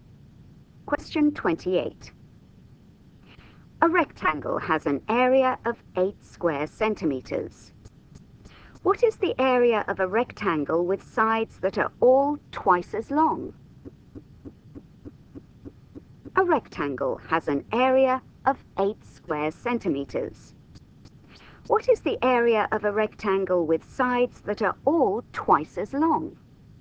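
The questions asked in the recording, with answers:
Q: What is the area of a rectangle with sides that are all twice as long?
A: 32 square centimeters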